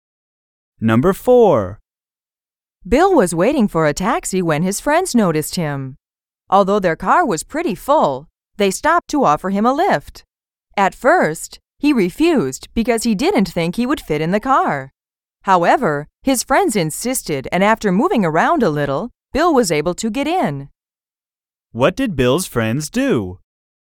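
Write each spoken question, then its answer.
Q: What did Bill's friends do?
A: They stopped and insisted on giving him a lift, making room for him in the car.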